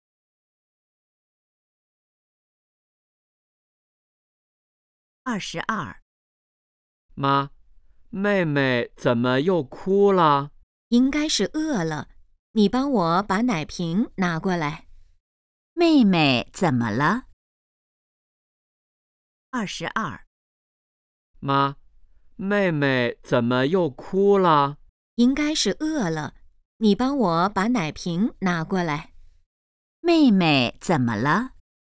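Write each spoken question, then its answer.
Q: 妹妹怎么了?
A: 饿了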